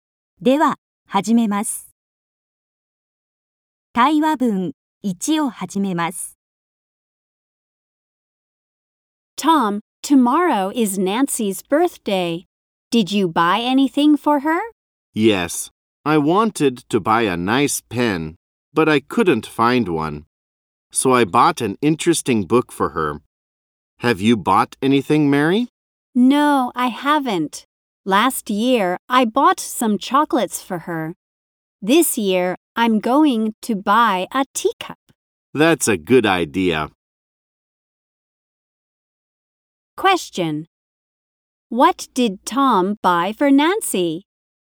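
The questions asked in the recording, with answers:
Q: What did Tom buy for Nancy?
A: An interesting book.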